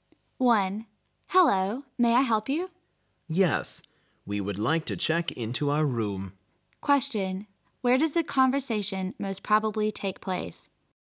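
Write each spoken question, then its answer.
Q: where does the conversation most probably take place?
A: At a hotel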